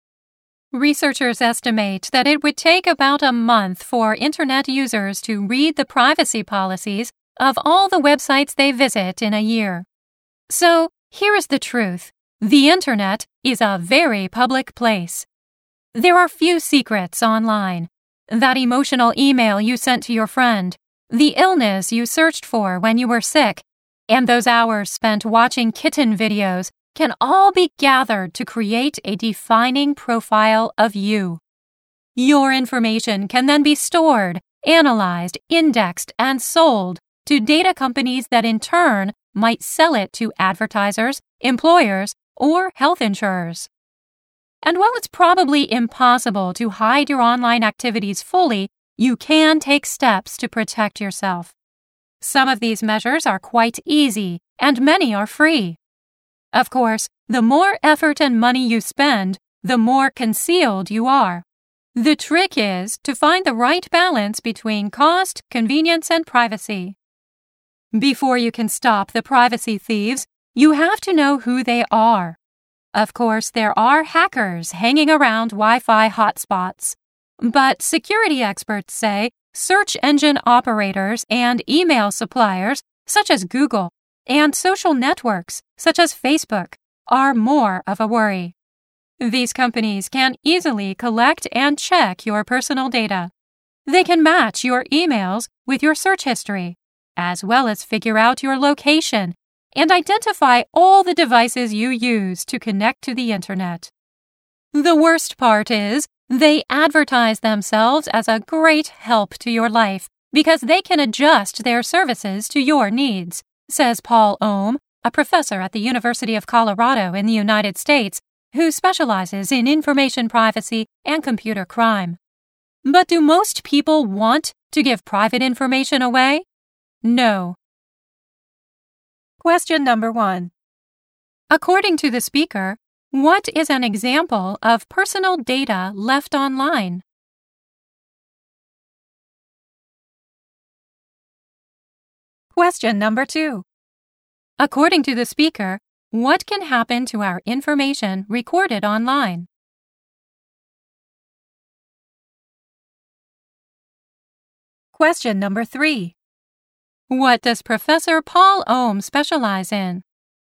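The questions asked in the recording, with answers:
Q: According to the speaker, what is an example of personal data left online?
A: An emotional email sent to a friend, illnesses searched for, or hours spent watching kitten videos

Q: According to the speaker, what can happen to our information recorded online?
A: It can be stored, analyzed, indexed, and sold to data companies, which might sell it to advertisers, employers, or health insurers

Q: What does Professor Paul Ohm specialize in?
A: Information privacy and computer crime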